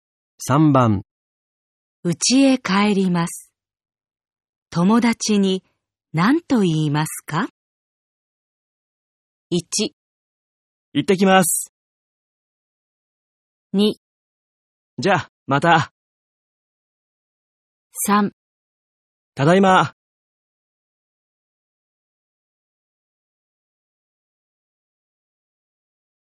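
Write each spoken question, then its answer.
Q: 家へ帰ります。友達に何と言いますか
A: 2: じゃあ、また。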